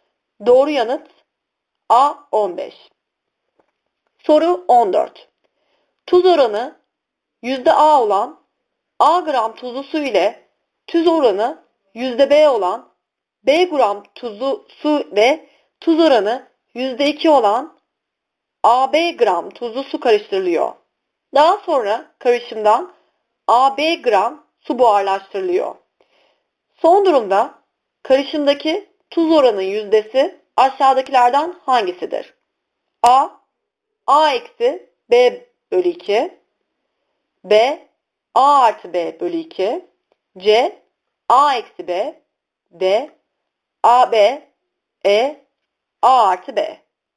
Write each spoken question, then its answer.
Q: Son durumda karışımdaki tuz oranın yüzdesi aşağıdakilerden hangisidir?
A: Doğru yanıt E, A artı B.